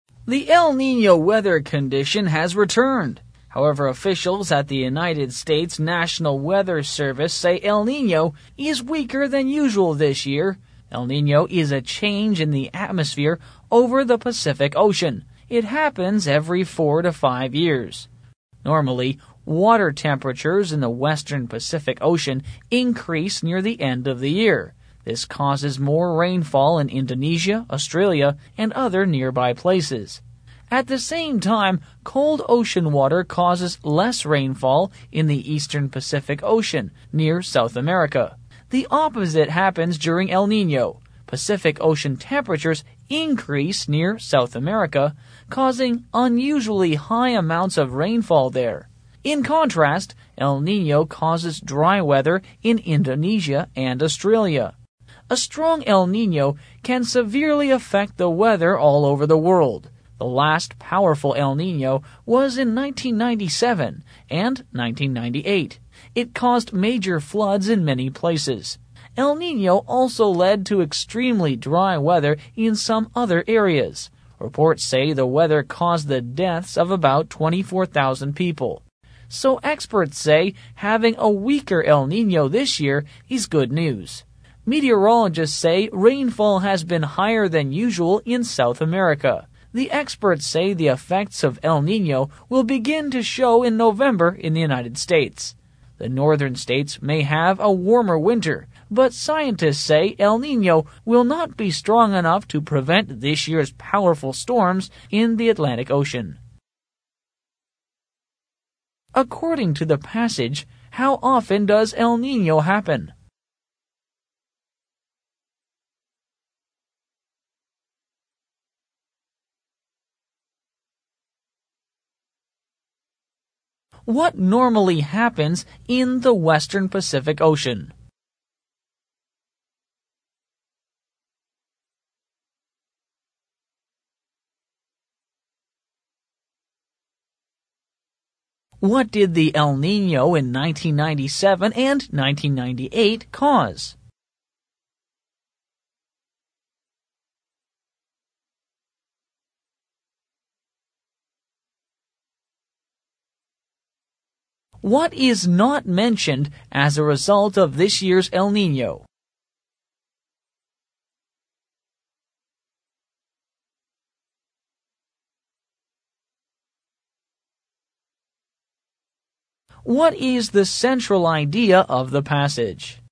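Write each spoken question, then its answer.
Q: According to the passage, how often does El Niño happen?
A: Every 4 to 5 years

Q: What normally happens in the western Pacific Ocean?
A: Water temperatures increase near the end of the year, bringing more rainfall to Indonesia and Australia

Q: What did the El Niño in 1997 and 1998 cause?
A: Major floods, extremely dry weather, and about 24,000 deaths

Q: What is the central idea of the passage?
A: El Niño has returned but is weaker than usual this year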